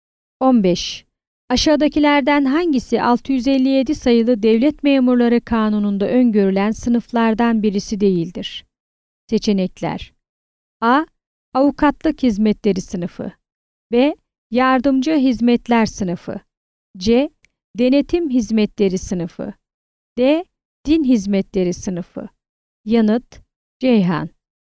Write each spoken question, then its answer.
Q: Aşağıdakilerden hangisi 657 sayılı Devlet Memurları Kanunu'nda öngörülen sınıflardan birisi değildir?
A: Yanıt: Ceyhan.